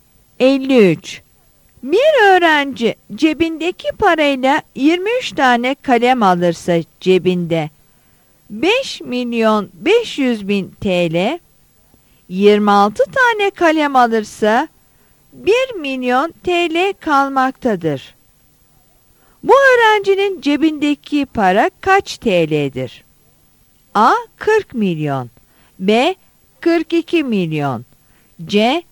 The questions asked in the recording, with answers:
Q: Bu öğrencinin cebindeki para kaç TL'dir?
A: Yanıt A'dır.